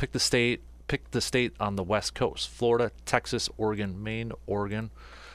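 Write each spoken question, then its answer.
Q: Pick the state on the West Coast.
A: Oregon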